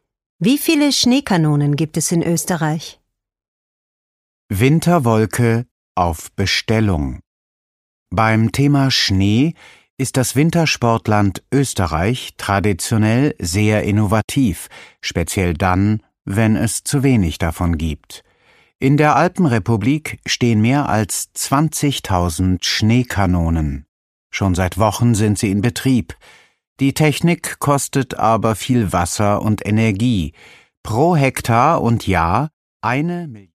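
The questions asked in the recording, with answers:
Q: Wie viele Schneekanonen gibt es in Österreich?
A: mehr als 20.000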